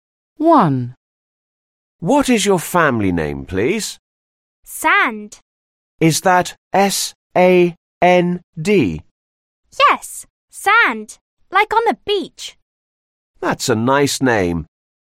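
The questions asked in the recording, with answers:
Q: What is your family name, please?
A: Sand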